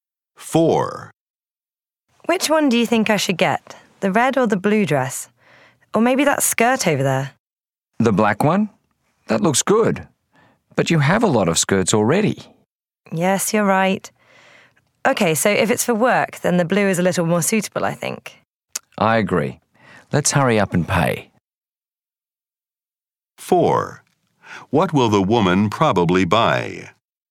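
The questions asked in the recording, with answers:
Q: What will the woman probably buy?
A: The blue dress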